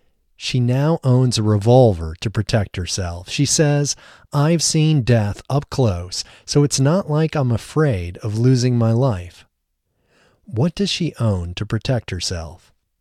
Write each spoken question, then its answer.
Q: What does she own to protect herself?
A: She owns a revolver to protect herself.